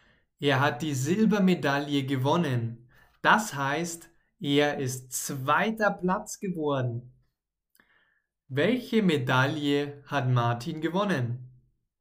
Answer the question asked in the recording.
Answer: Die Silbermedaille.